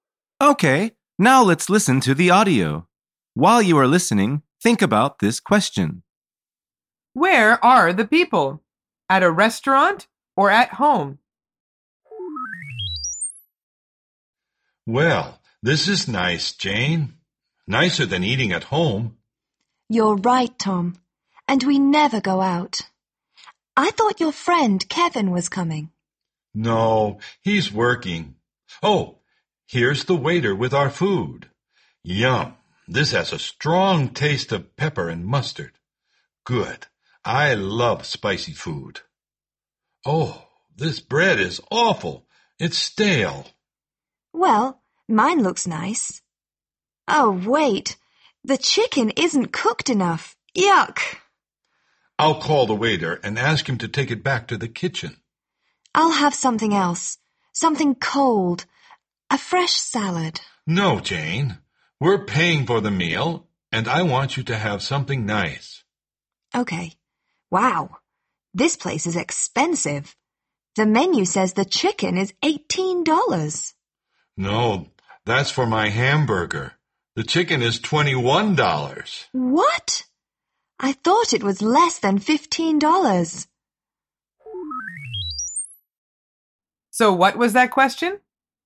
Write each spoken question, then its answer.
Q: Where are the people? At a restaurant or at home?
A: The answer is, at a restaurant.